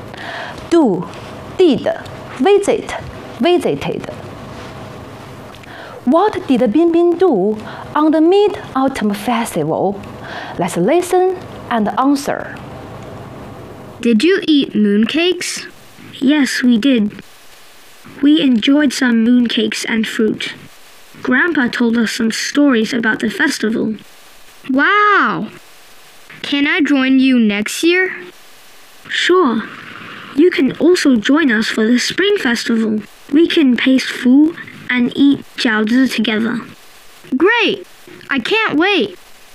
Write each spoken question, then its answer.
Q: What did Bin Bin do on the Mid-Autumn Festival?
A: He enjoyed some mooncakes and fruit.